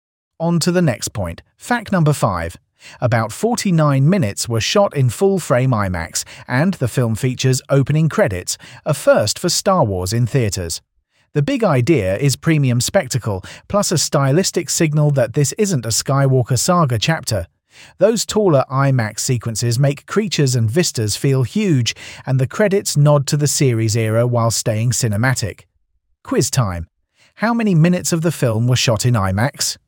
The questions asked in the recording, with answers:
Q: How many minutes of the film were shot in IMAX?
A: Correct answer, 49 minutes.